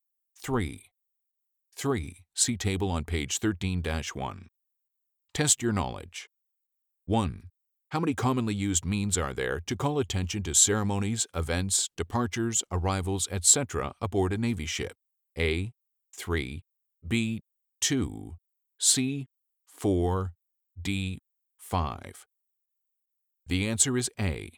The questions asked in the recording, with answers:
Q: How many commonly used means are there to call attention to ceremonies, events, departures, arrivals, etc. aboard a Navy ship?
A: The answer is A. 3.